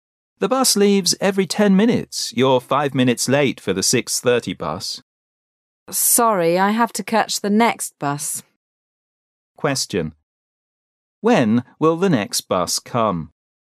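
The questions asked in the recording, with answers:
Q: When will the next bus come?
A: At 6:40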